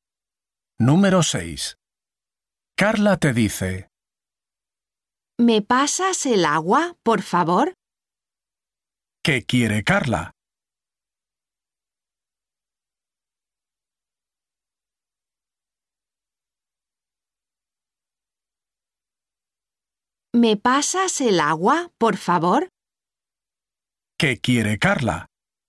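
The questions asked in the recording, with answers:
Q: ¿Qué quiere Carla?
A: El agua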